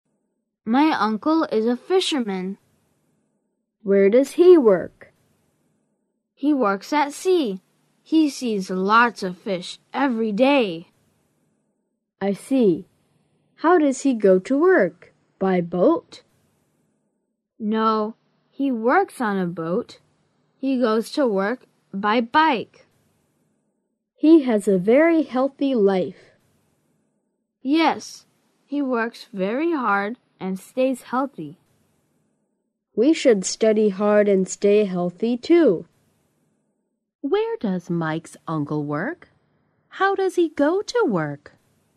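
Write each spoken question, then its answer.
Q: Where does Mike's uncle work?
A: At sea (on a boat)

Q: How does he go to work?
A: By bike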